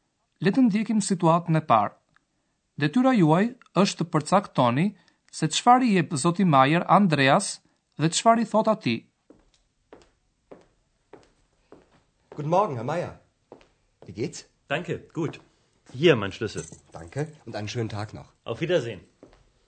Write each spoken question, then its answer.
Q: Detyra juaj është të përcaktoni se çfarë i jep Zoti Majer Andreas dhe çfarë i thot atij.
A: Zoti Majer vendos mbi tavolinë Chelsin e tij dhe thot: Urdhroni Chelsin tim.